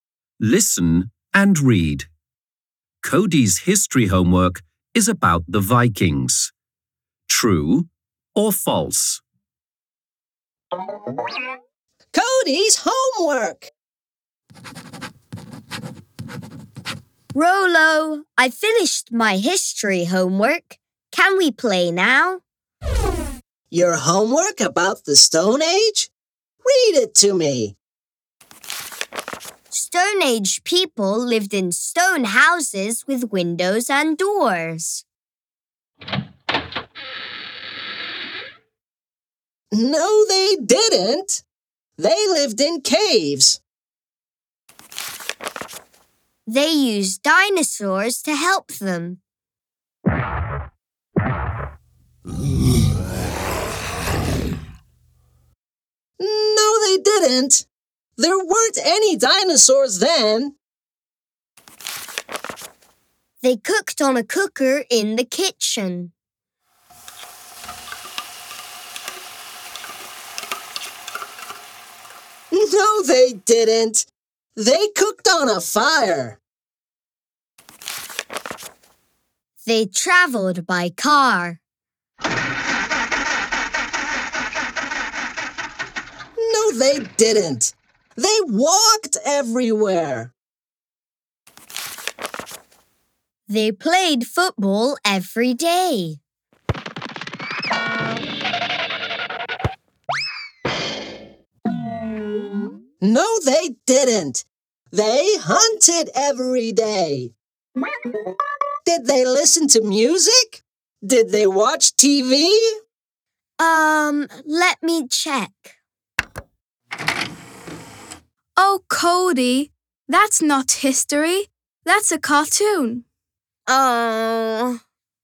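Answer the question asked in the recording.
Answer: False (it is about the Stone Age)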